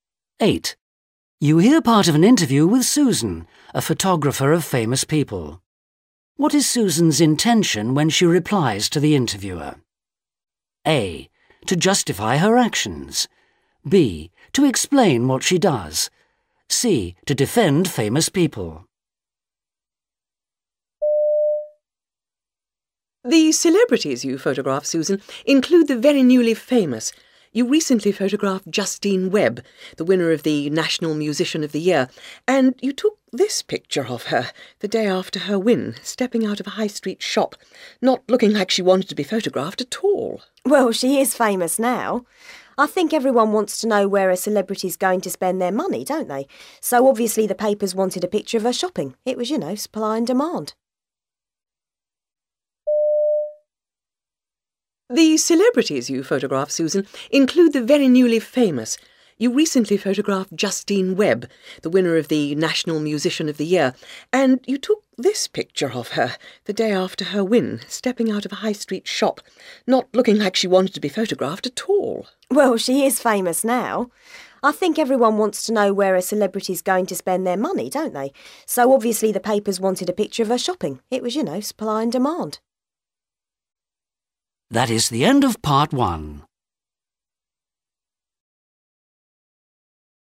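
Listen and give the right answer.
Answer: A: To justify her actions.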